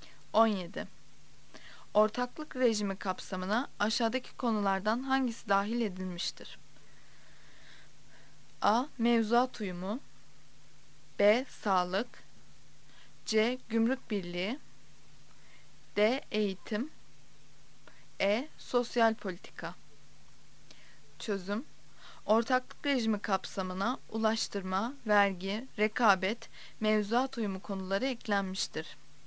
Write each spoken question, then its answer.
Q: Ortaklık rejimi kapsamına aşağıdaki konulardan hangisi dahil edilmiştir?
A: Yanıt A'dır. A. Mevzuat uyumu.